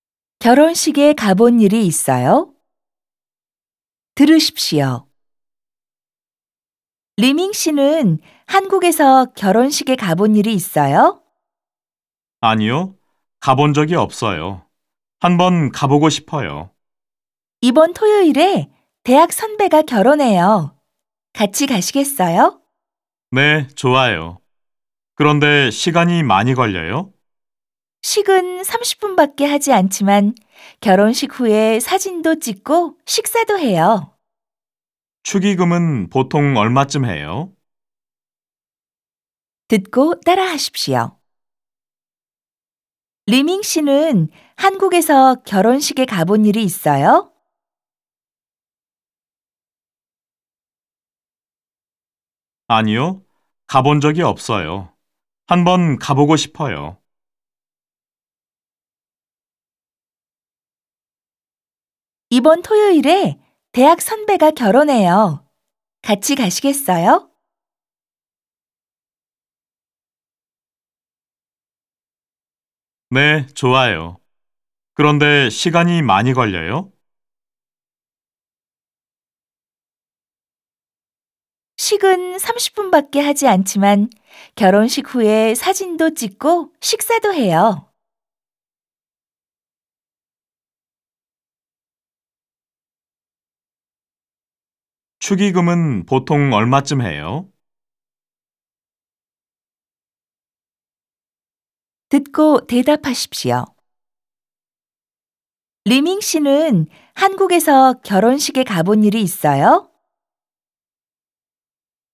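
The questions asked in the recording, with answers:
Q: 리밍 씨는 한국에서 결혼식에 가본 일이 있어요?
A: 아니요, 가본 적이 없어요.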